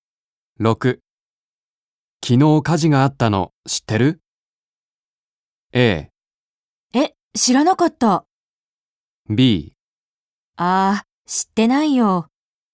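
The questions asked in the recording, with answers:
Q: 昨日火事があったの知ってる?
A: A: え、知らなかった。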